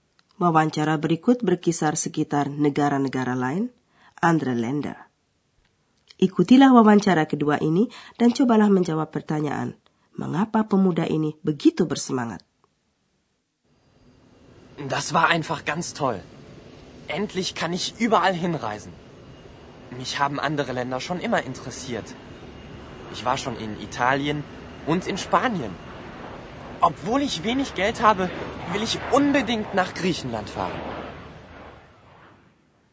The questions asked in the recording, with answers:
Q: mengapa pemuda ini begitu bersemangat?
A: Anak muda ini penuh semangat karena sekarang terpenuhilah keinginan lama, yaitu ia dapat bepergian kemana-mana.